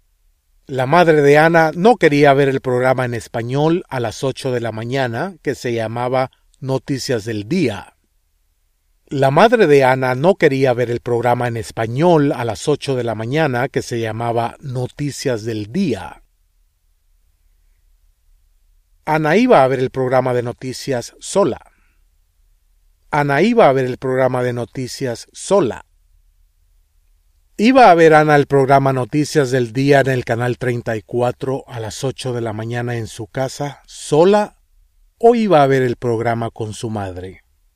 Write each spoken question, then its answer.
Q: ¿Iba a ver Anna el programa Noticias del Día en el canal 34 a las 8 de la mañana en su casa sola o iba a ver el programa con su madre?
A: Anna iba a ver el programa de noticias sola.